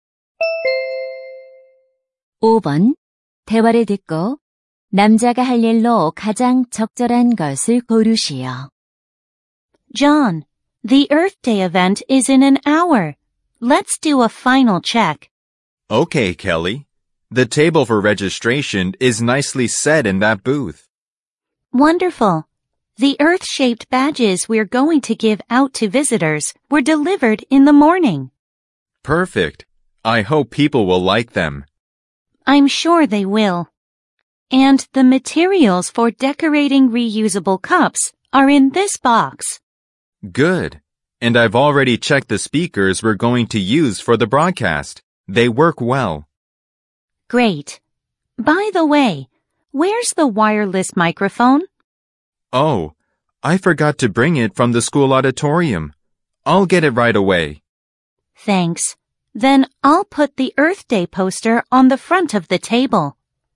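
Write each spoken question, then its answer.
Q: 대화를 듣고 남자가 할 일로 가장 적절한 것을 고르시오.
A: 무선 마이크 가져오기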